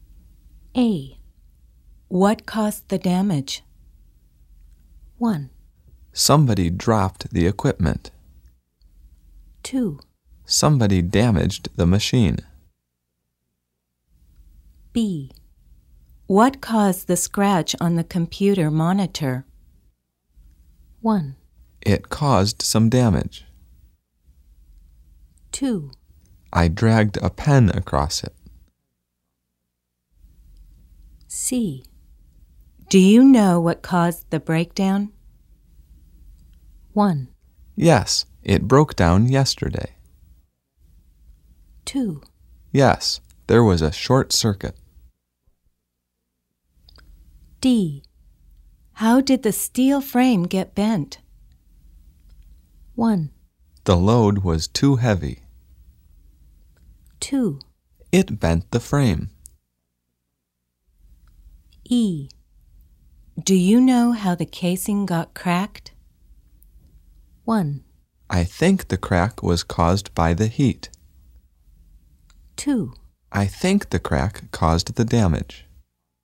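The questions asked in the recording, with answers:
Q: What caused the damage?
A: 1: Somebody dropped the equipment.

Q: What caused the scratch on the computer monitor?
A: 2: I dragged a pen across it.

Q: Do you know what caused the breakdown?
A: 2: Yes, there was a short circuit.

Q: How did the steel frame get bent?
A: 1: The load was too heavy.

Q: Do you know how the casing got cracked?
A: 1: I think the crack was caused by the heat.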